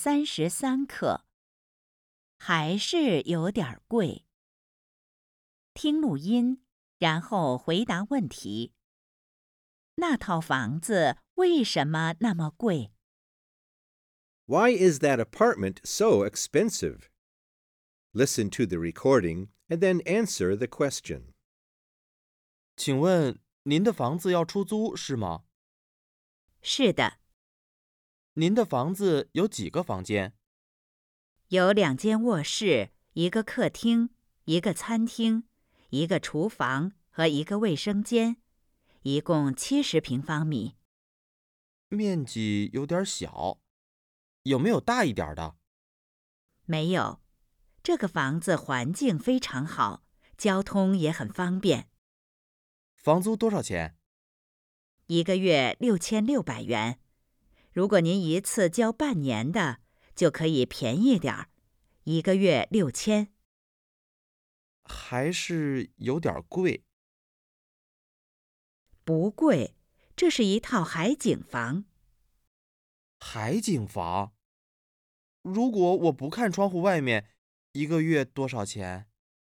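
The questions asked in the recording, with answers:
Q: 那套房子为什么那么贵?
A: 因为是一套海景房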